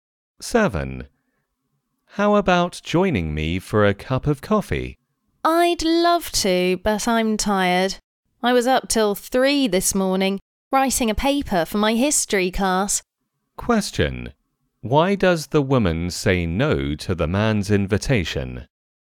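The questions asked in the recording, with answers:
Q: Why does the woman say no to the man's invitation?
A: She is tired because she stayed up till 3 writing a paper.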